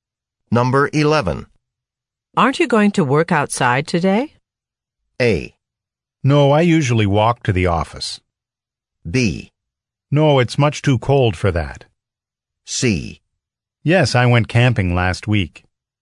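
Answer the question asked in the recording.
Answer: B: No, it's much too cold for that.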